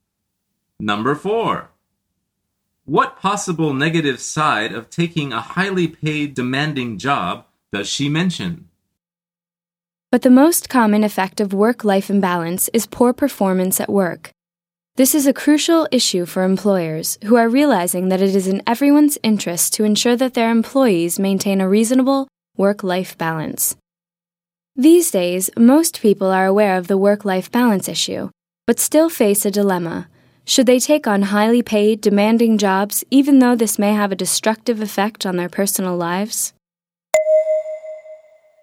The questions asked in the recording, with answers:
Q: What possible negative side of taking a highly paid, demanding job does she mention?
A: The answer is a destructive effect on your personal life.